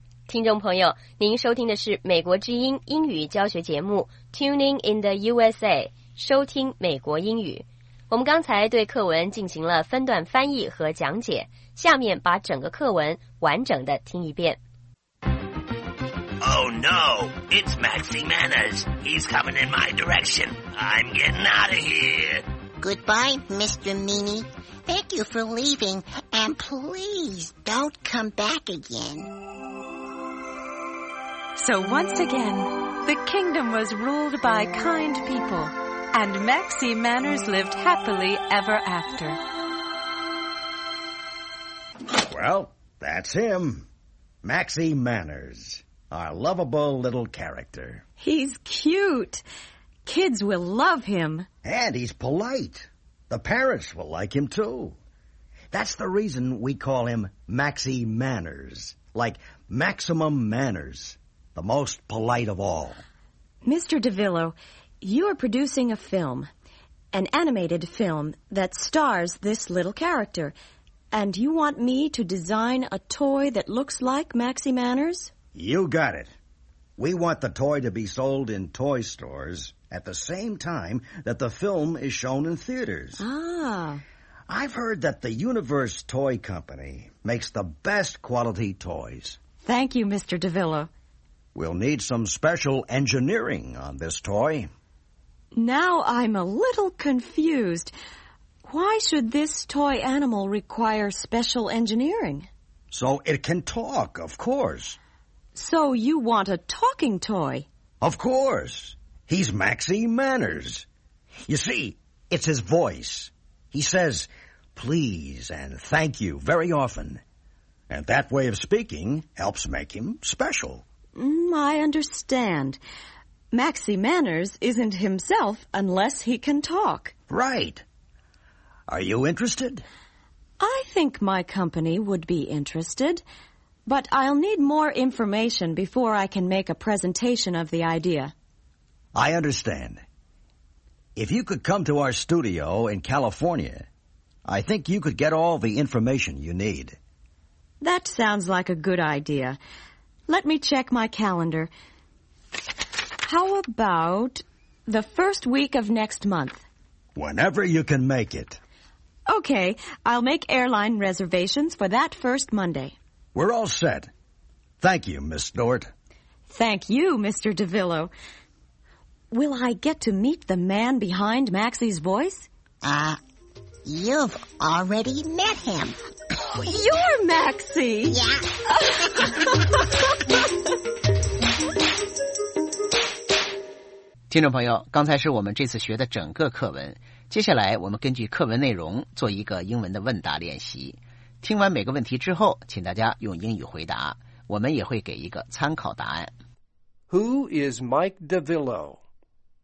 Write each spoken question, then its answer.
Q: Who is Mike DeVillo?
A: He is a film producer.